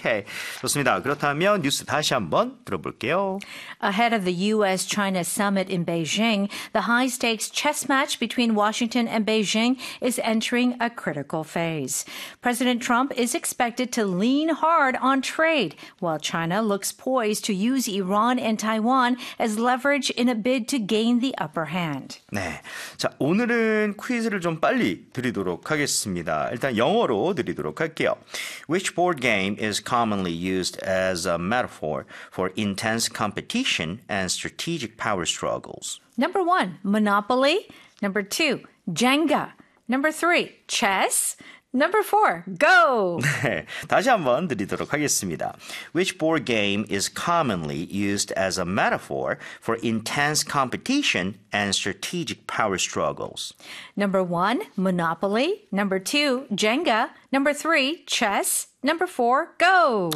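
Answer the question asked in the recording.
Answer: 3: Chess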